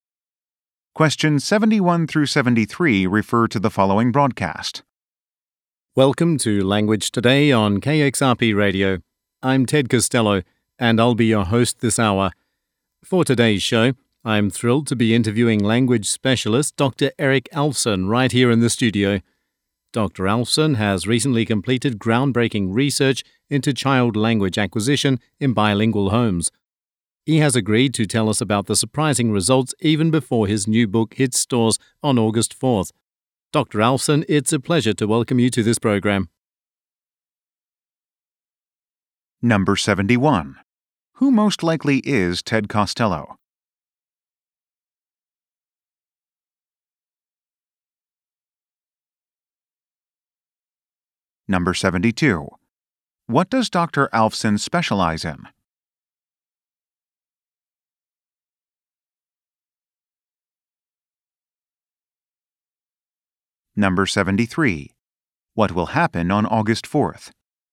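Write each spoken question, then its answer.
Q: Who most likely is Ted Costello?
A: A radio host

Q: What does Dr. Alfson specialize in?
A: Language (child language acquisition)

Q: What will happen on August 4th?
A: His new book will be released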